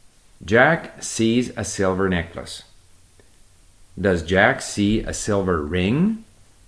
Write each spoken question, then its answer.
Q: Does Jack see a silver ring?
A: No, not a ring. He sees a silver necklace, not a ring.